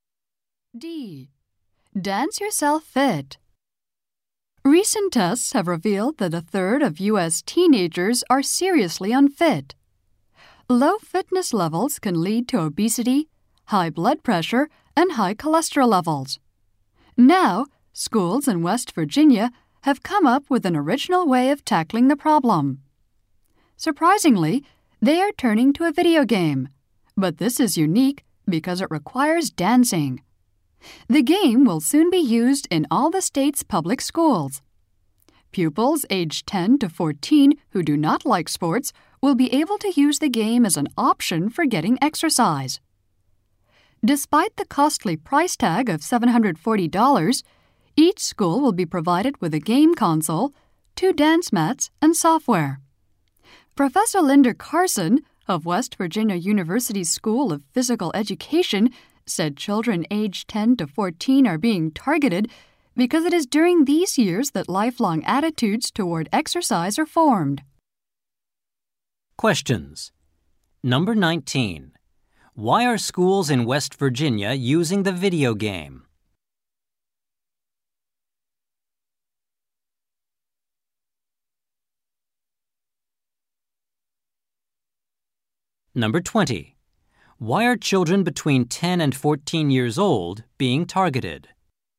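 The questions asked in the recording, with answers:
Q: Why are schools in West Virginia using the video game?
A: To help unfit pupils who don't like sports get exercise.

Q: Why are children between 10 and 14 years old being targeted?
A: Lifelong attitudes toward exercise form at those ages.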